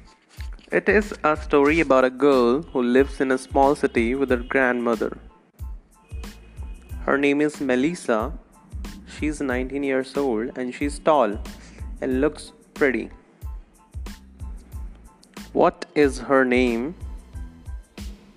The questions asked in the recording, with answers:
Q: What is her name?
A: Her name is Melissa. Her name is Melissa.